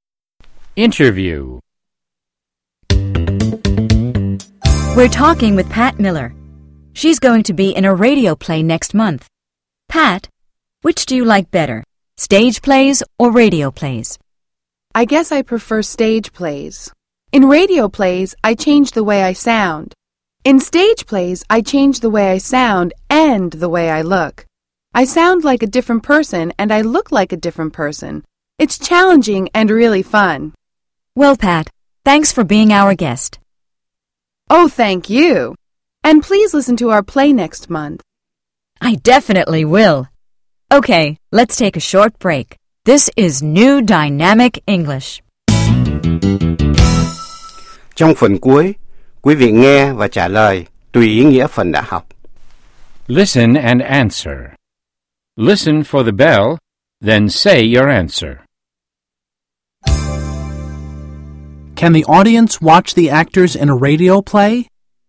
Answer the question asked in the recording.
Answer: No, they can't. They can only listen.